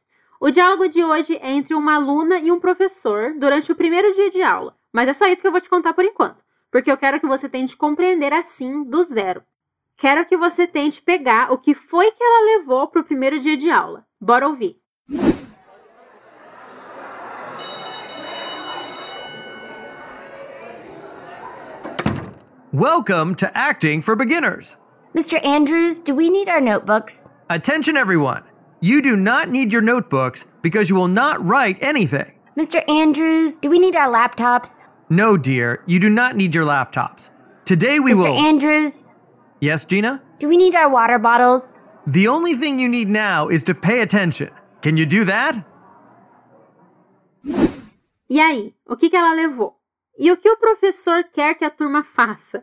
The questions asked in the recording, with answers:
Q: E o que o professor quer que a turma faça?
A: A única coisa que você precisa agora é prestar atenção.